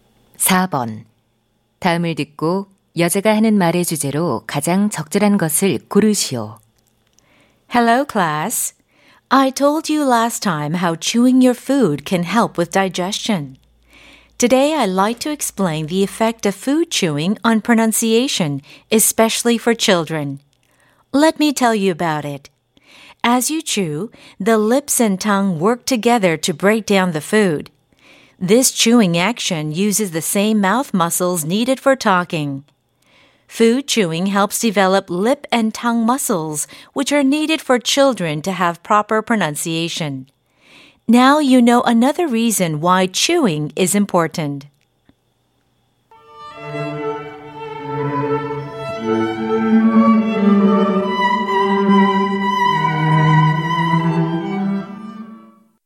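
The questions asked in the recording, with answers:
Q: 다음을 듣고 여자가 하는 말의 주제로 가장 적절한 것을 고르시오.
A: 음식 씹기가 아이들의 발음에 미치는 영향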